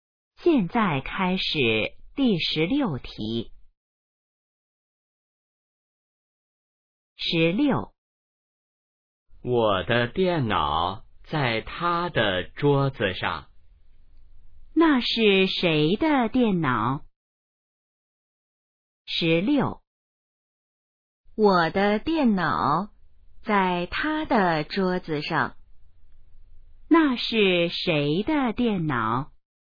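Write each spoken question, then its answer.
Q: 那是谁的电脑?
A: 我的(说话人的)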